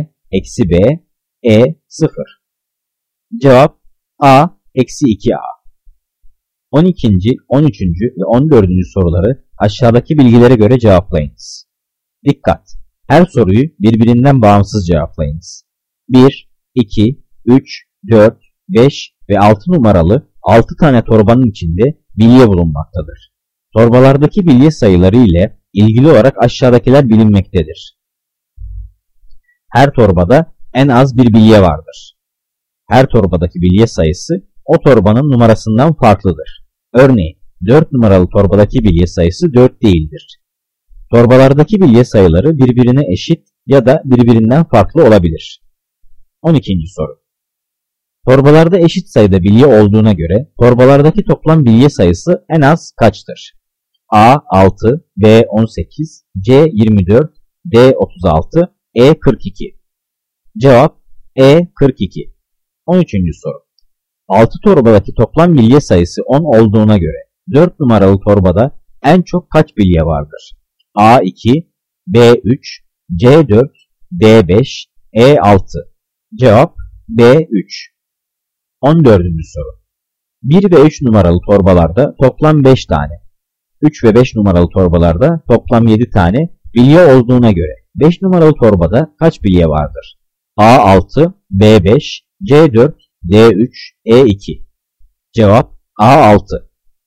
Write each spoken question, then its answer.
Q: Torbalarda eşit sayıda bilye olduğuna göre torbalardaki toplam bilye sayısı en az kaçtır?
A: Cevap E42.

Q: 6 torbadaki toplam bilye sayısı 10 olduğuna göre 4 numaralı torbada en çok kaç bilye vardır?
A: Cevap B3.

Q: 1 ve 3 numaralı torbalarda toplam 5 tane, 3 ve 5 numaralı torbalarda toplam 7 tane bilye olduğuna göre 5 numaralı torbada kaç bilye vardır?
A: Cevap A6.